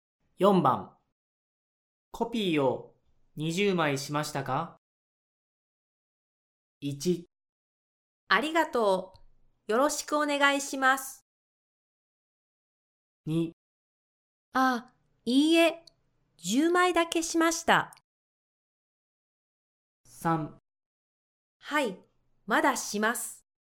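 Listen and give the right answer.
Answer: 2: いいえ、10枚だけしました。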